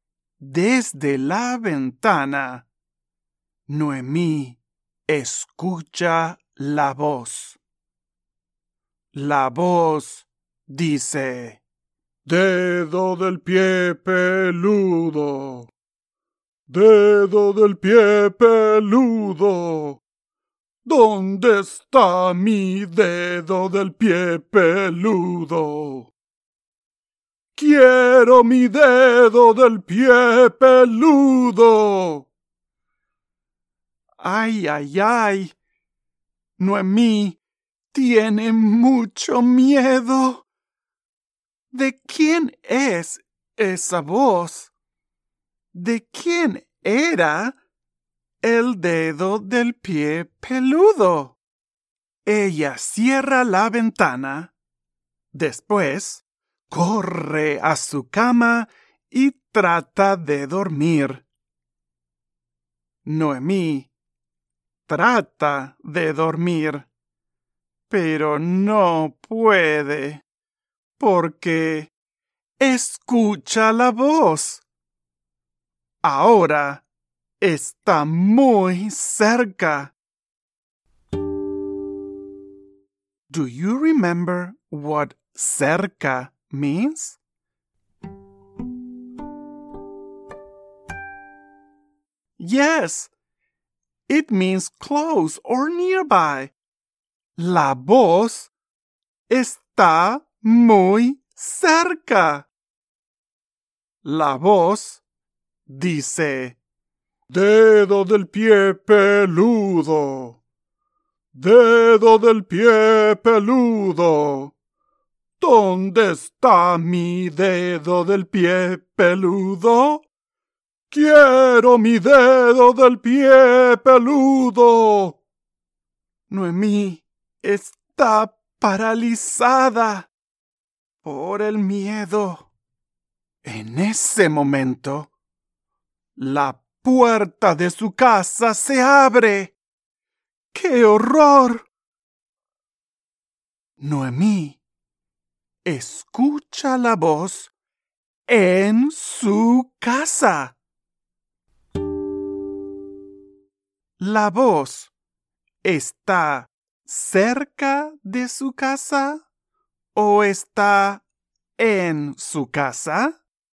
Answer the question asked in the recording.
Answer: Está en su casa.